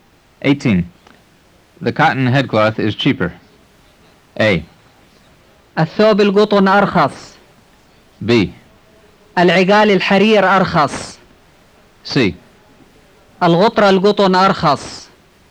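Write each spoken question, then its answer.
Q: The cotton headcloth is cheaper.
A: C: الغطرة القطن أرخص.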